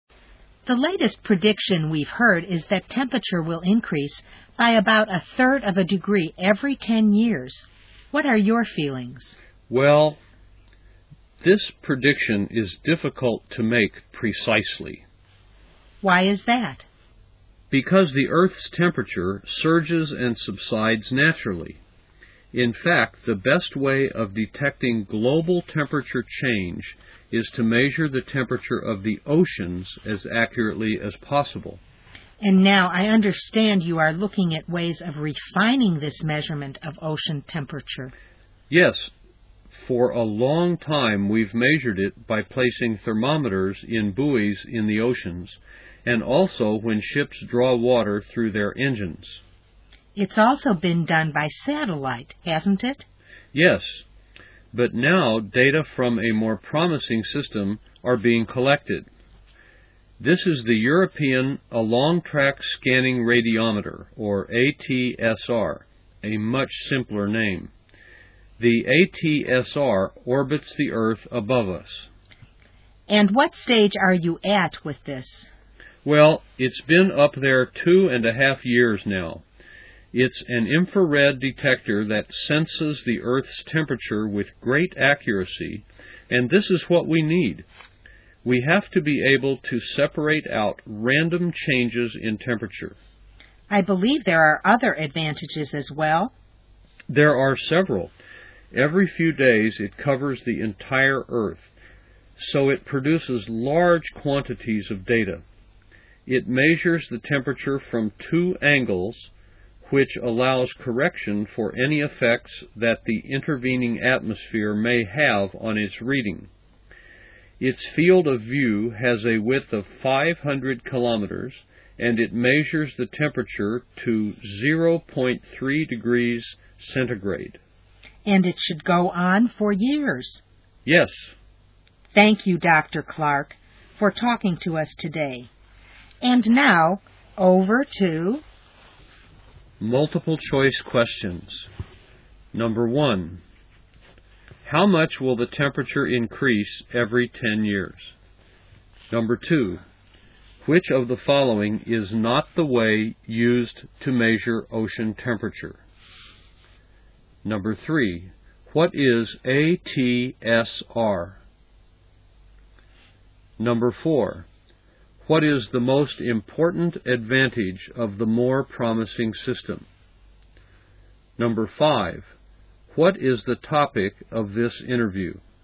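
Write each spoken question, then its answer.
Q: how much will the temperature increase every 10 years?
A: About a third of a degree

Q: what is ATSR?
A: The European Along-Track Scanning Radiometer, an infrared detector orbiting the Earth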